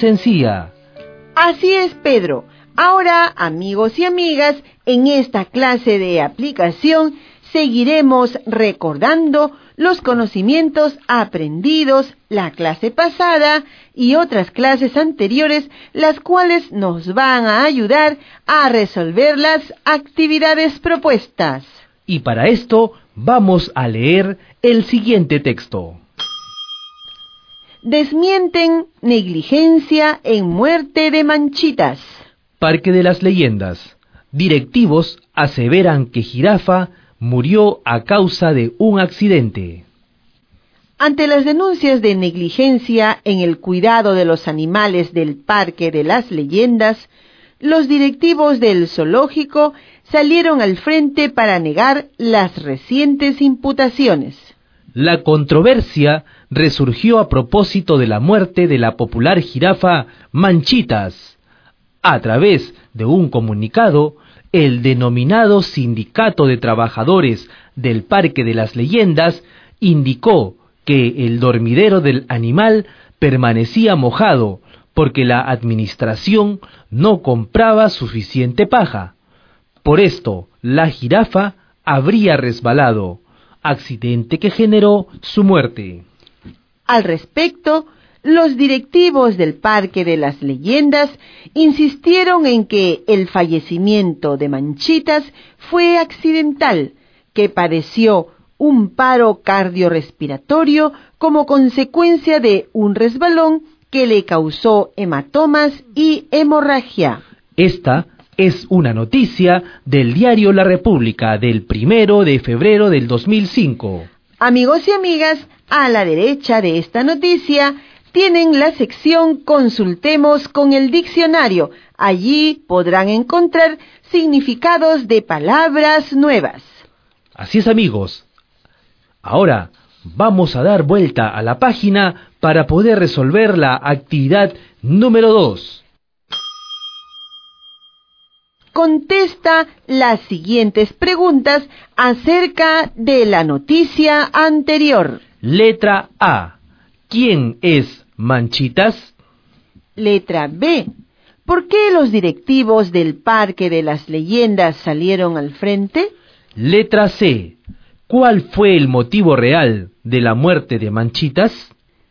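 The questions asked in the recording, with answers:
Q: ¿Quién es Manchitas?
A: Una jirafa del Parque de las Leyendas

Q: ¿Por qué los directivos del Parque de las Leyendas salieron al frente?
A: Para negar las denuncias de negligencia en el cuidado de los animales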